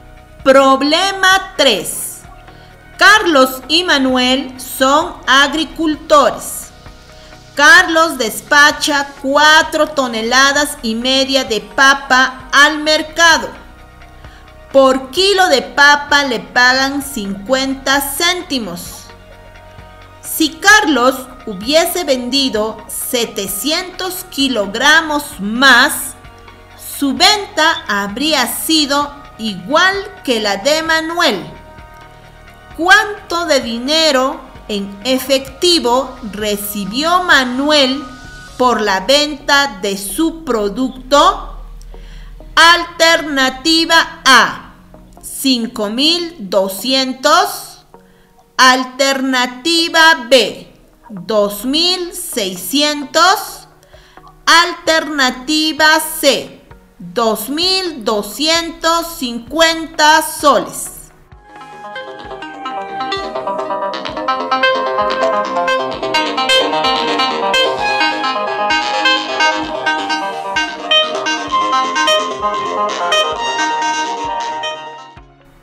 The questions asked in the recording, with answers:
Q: ¿Cuánto de dinero en efectivo recibió Manuel por la venta de su producto?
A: La respuesta correcta es 2,600 soles.